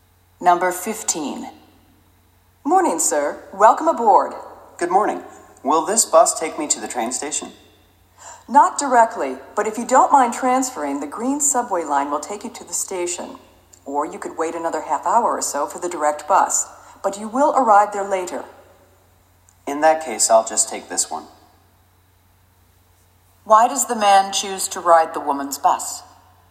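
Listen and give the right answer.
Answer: Because waiting for the direct bus would get him to the station later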